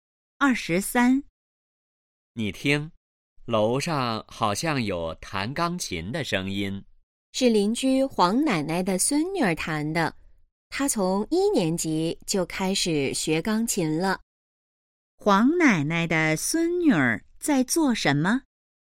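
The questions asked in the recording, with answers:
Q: 黄奶奶的孙女儿在做什么?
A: 弹钢琴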